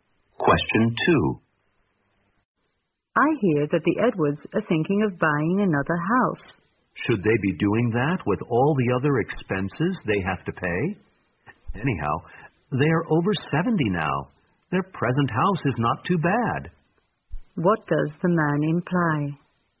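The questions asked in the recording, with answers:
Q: What does the man imply?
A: The Edwards should not buy another house.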